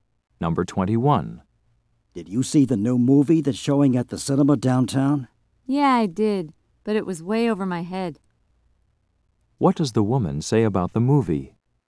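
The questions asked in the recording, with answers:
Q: What does the woman say about the movie?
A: She didn't understand it.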